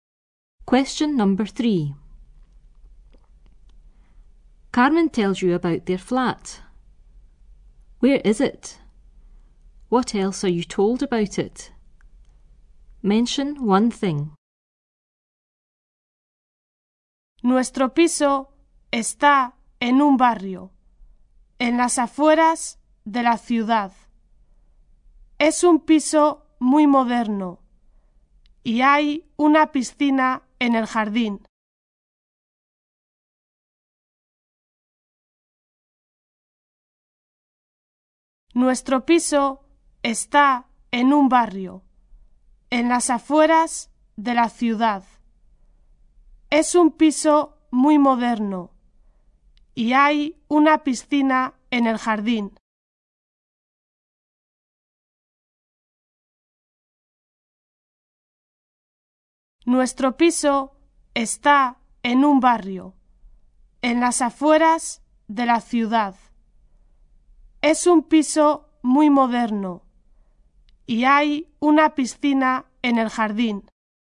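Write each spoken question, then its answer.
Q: Where is it? What else are you told about it?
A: In a district on the outskirts of the city; it is very modern / there is a swimming pool in the garden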